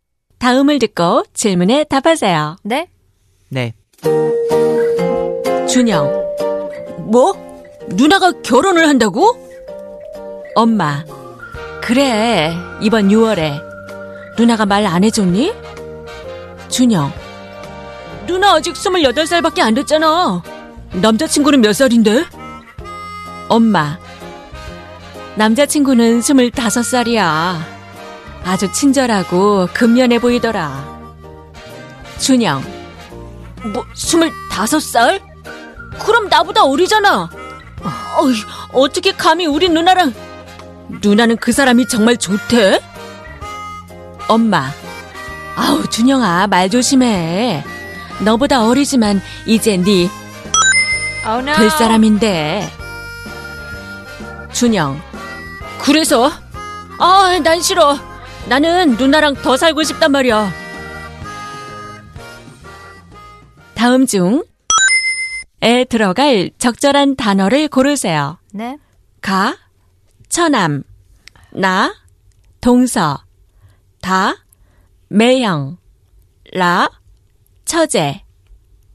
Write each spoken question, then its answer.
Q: 다음 중에 들어갈 적절한 단어를 고르세요.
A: Which we chose, 다, 매형.